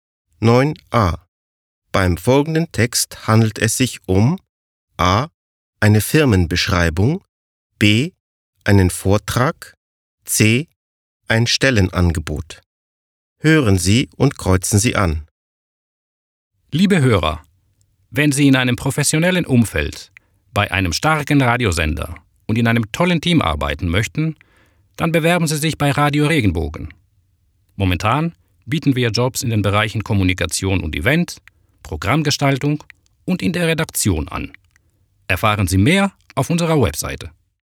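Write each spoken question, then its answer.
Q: Beim folgenden Text handelt es sich um A. eine Firmenbeschreibung, B. einen Vortrag, C. ein Stellenangebot.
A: C: ein Stellenangebot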